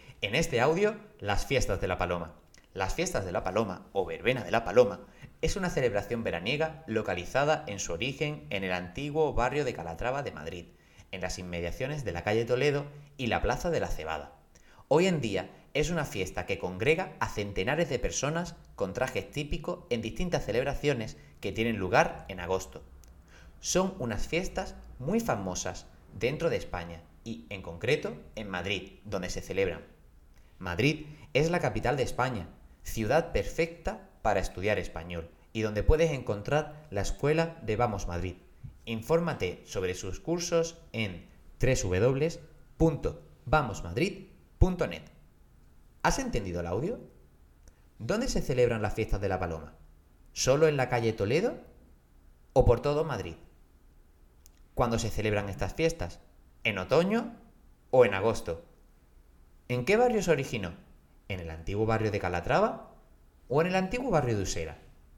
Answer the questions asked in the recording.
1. Se celebran por todo Madrid.
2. Son en agosto
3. su origen es el antiguo barrio de Calatrava.